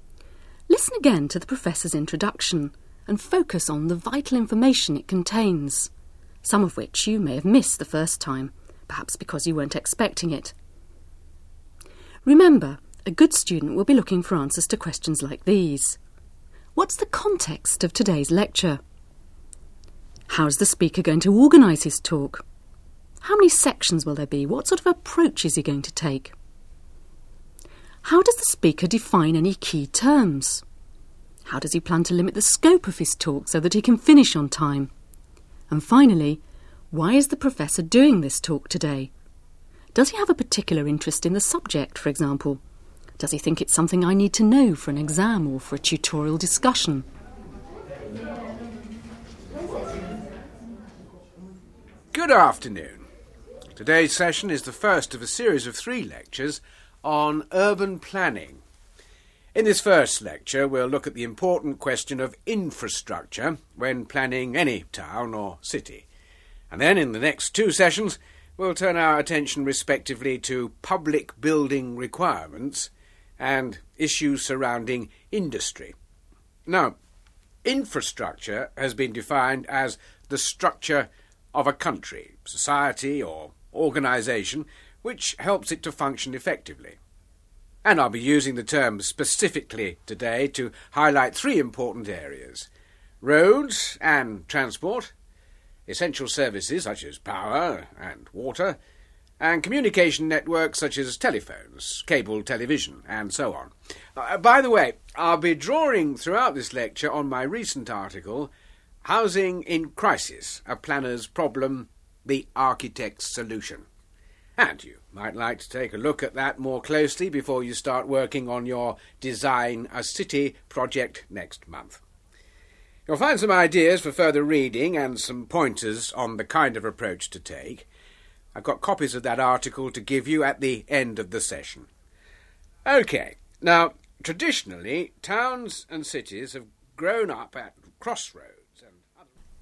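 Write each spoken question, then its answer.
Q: What's the context of today's lecture?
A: It is the first of a series of three lectures on urban planning; the next two cover public building requirements and industry.

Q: How does the speaker define any key terms?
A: Infrastructure is the structure of a country, society or organisation which helps it to function effectively.

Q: How does he plan to limit the scope of his talk so that he can finish on time?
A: He focuses on three areas: roads and transport, essential services such as power and water, and communication networks.

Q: Does he have a particular interest in the subject, for example?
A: Yes, he recently wrote an article, Housing in Crisis, A Planner's Problem, The Architect's Solution, and draws on it.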